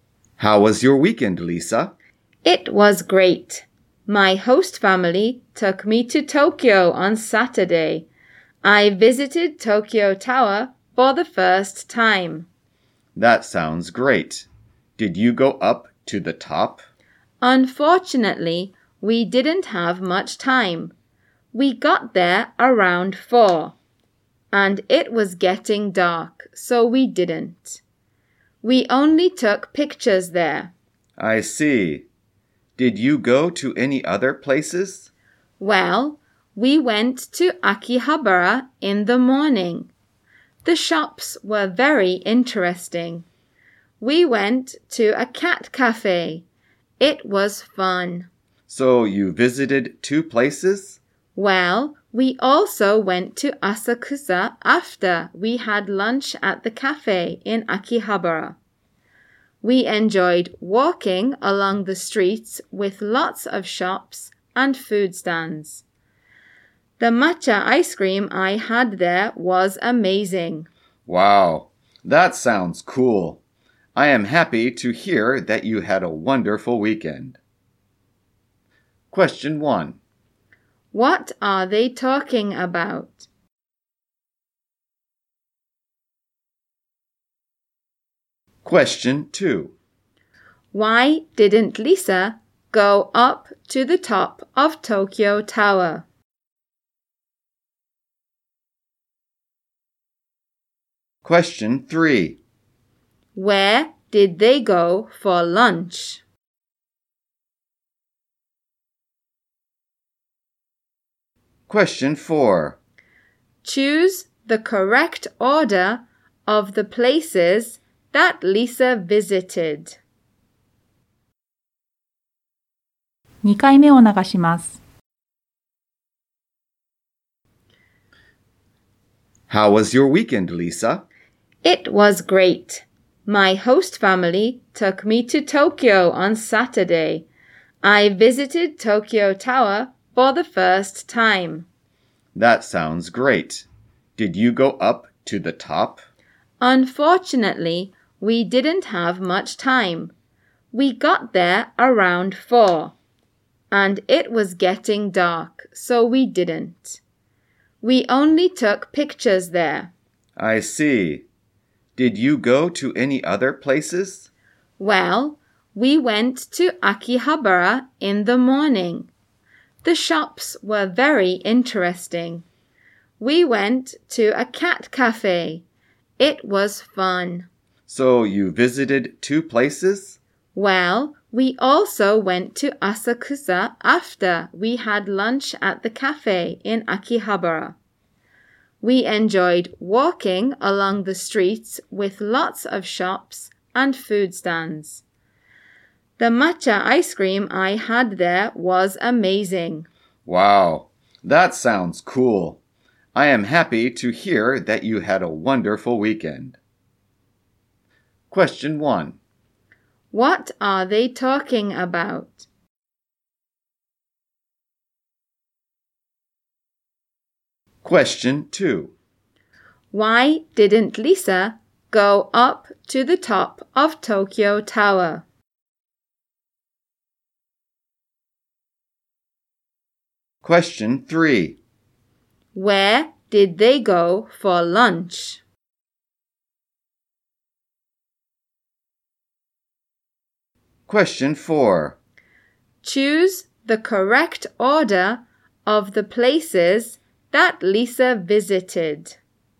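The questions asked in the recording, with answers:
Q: What are they talking about?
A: Lisa's weekend trip to Tokyo.

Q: Why didn't Lisa go up to the top of Tokyo Tower?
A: They didn't have much time and it was getting dark.

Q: Where did they go for lunch?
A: A cafe in Akihabara.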